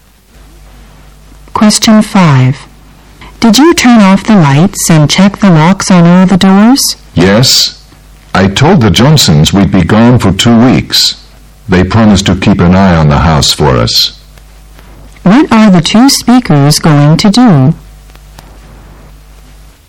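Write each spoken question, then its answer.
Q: What are the two speakers going to do?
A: Go away on a two-week trip.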